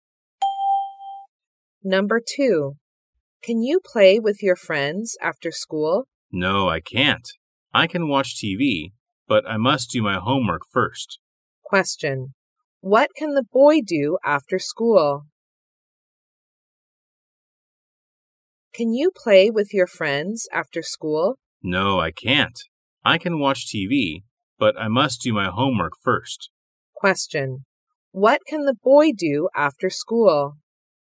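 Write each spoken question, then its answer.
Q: What can the boy do after school?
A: Watch TV after doing his homework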